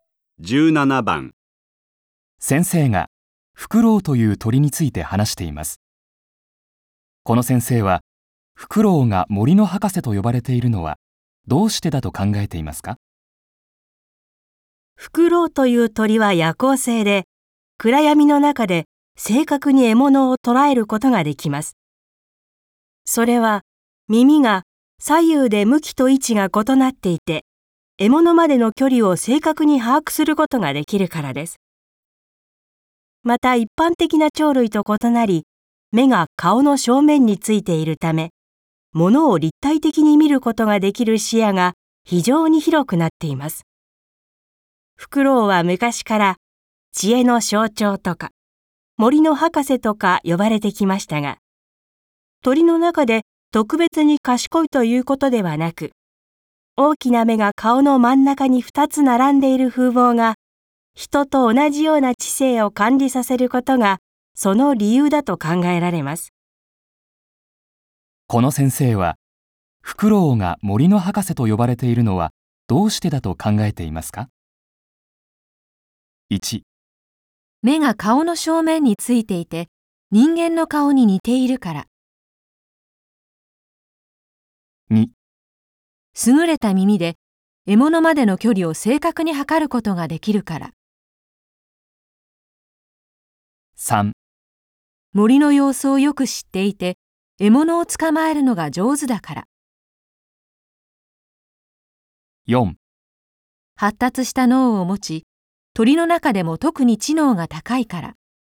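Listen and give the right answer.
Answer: 1: 目が顔の正面についていて、人間の顔に似ているから。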